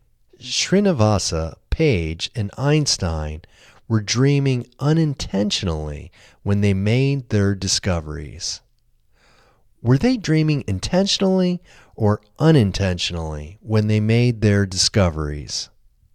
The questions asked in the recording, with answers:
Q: Were they dreaming intentionally or unintentionally when they made their discoveries?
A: They were dreaming unintentionally when they made their discoveries.